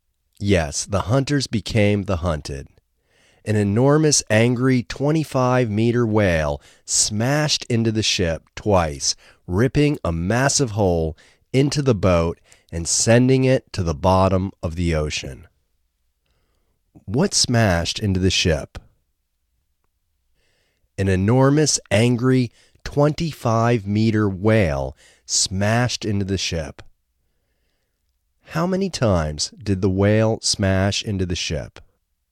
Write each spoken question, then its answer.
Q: What smashed into the ship?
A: An enormous, angry 25-meter whale smashed into the ship.